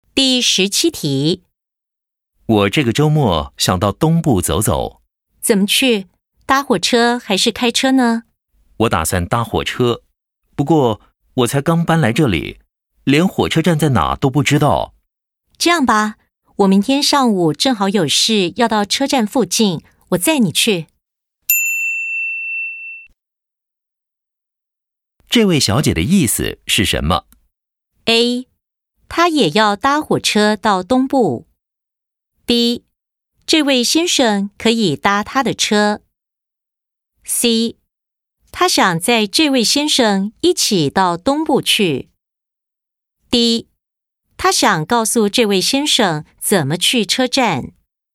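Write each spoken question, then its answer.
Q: 这位小姐的意思是什么?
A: B: 这位先生可以搭她的车。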